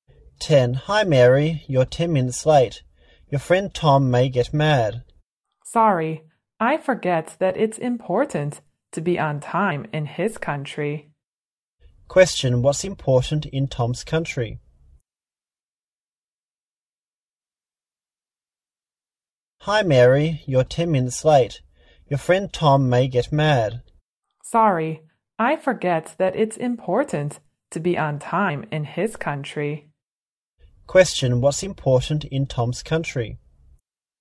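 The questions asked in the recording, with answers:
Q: What's important in Tom's country?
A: Being on time.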